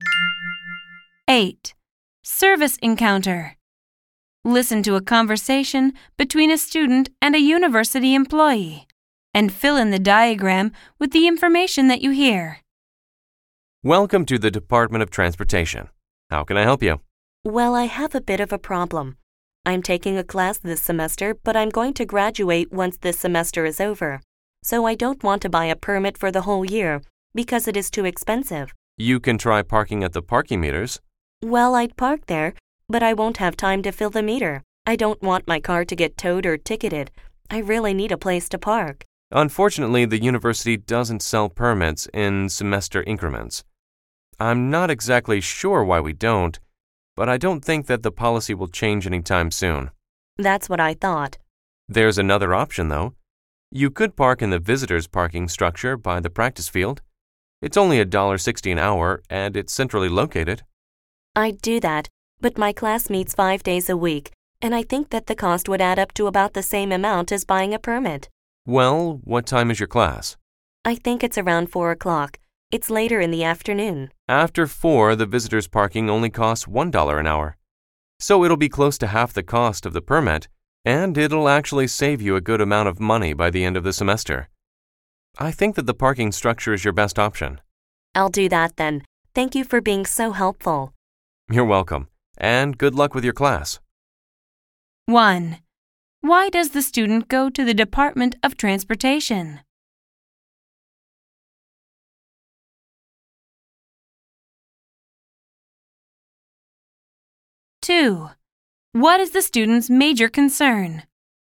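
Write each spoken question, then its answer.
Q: Why does the student go to the Department of Transportation?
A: To find a parking option for one semester, because a full-year permit is too expensive.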